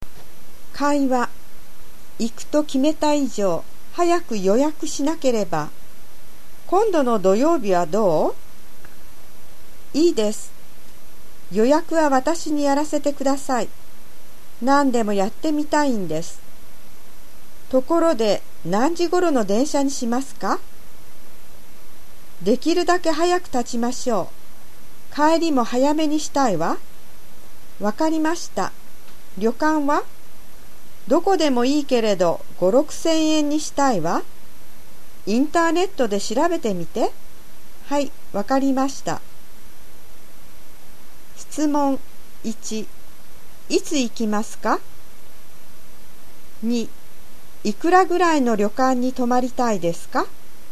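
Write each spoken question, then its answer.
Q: いつ行きますか?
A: 今度の土曜日

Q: いくらぐらいの旅館に泊まりたいですか?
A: 5,000〜6,000円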